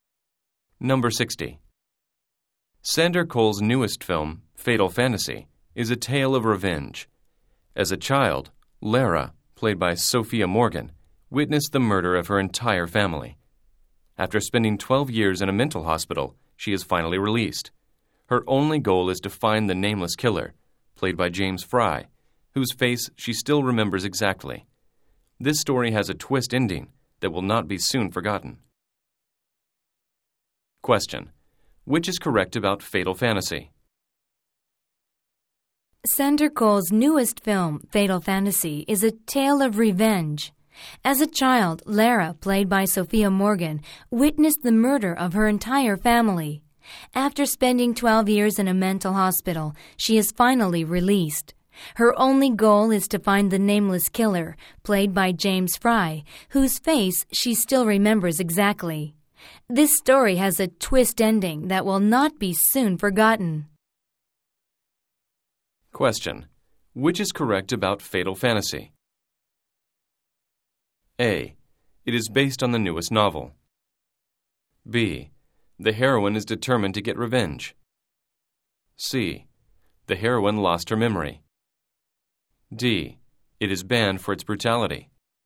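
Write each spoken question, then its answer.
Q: which is correct about Fatal Fantasy?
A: B: The heroine is determined to get revenge.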